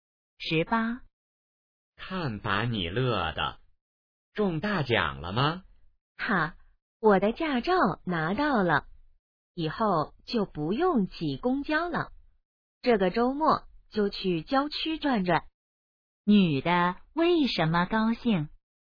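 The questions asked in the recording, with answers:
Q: 女的为什么高兴?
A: 拿到驾照了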